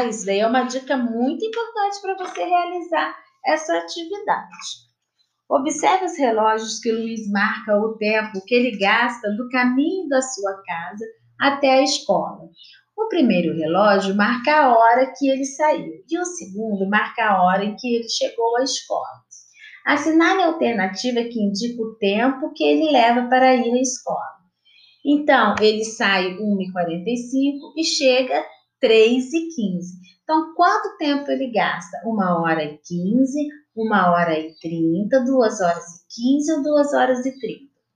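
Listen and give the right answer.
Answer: 1 hora e 30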